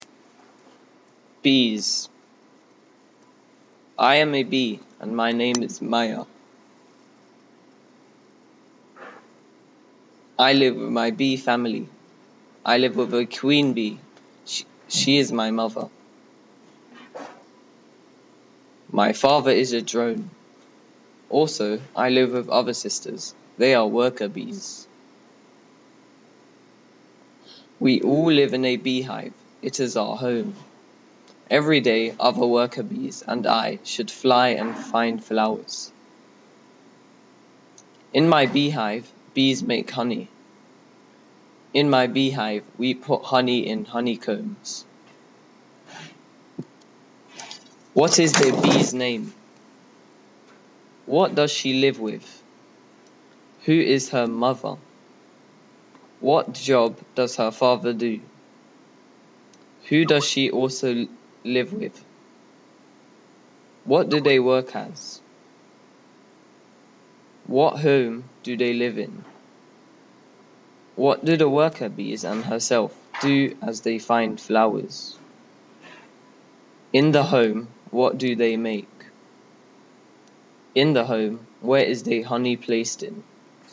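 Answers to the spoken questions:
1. Maya
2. Her bee family
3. The queen bee
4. He is a drone
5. Other sisters
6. Worker bees
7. A beehive
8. They fly
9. Honey
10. In honeycombs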